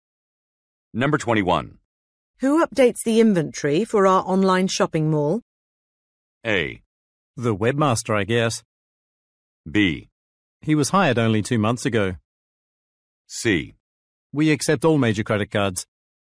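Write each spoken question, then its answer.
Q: Who updates the inventory for our online shopping mall?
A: A: The webmaster, I guess.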